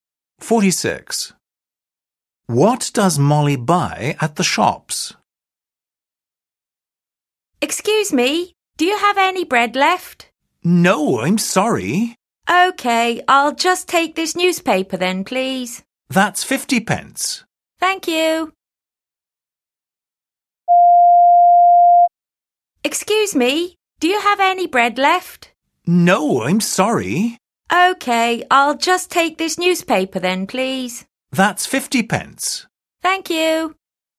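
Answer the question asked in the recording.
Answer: a newspaper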